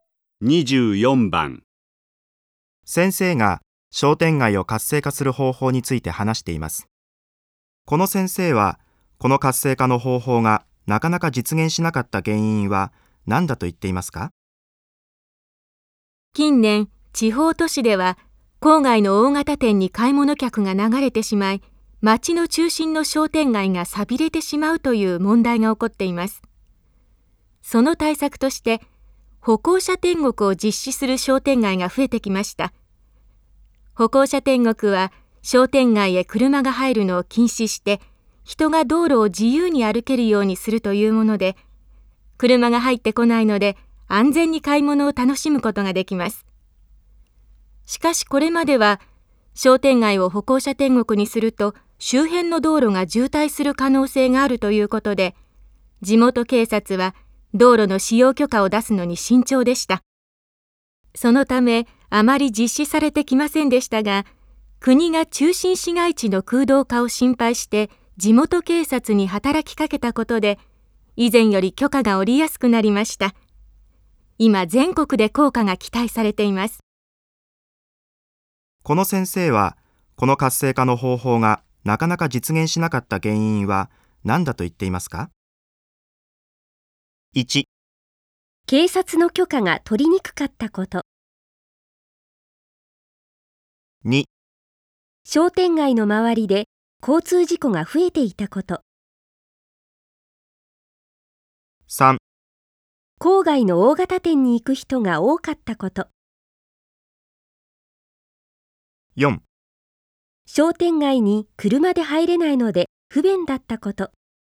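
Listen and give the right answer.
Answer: 1: 警察の許可が取りにくかったこと。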